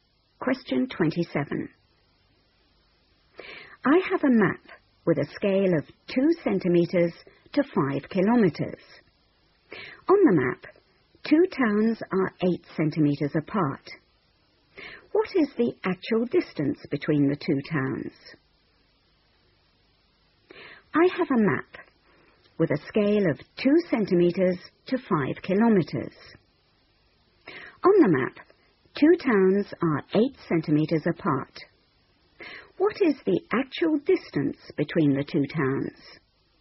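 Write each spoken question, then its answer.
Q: What is the actual distance between the two towns?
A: 20 km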